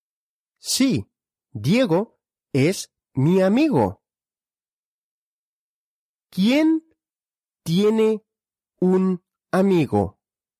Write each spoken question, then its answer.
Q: ¿Quién tiene un amigo?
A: Yo, yo tengo un amigo.